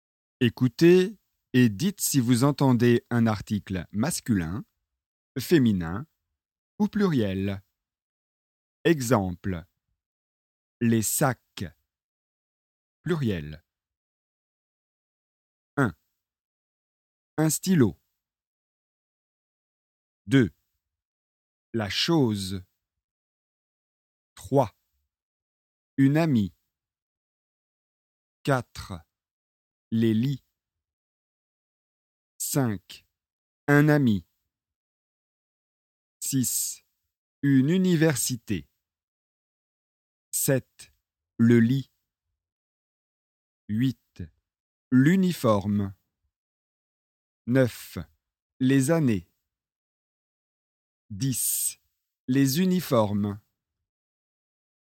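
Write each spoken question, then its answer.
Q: Un stylo.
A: masculin

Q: La chose.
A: féminin

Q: Une amie.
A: féminin

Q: Les lits.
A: pluriel

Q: Un ami.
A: masculin

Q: Une université.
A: féminin

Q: Le lit.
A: masculin

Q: Les années.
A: pluriel

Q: Les uniformes.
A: pluriel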